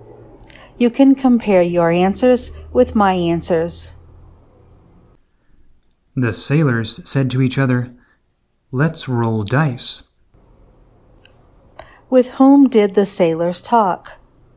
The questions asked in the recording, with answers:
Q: With whom did the sailors talk?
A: The sailors talked to each other.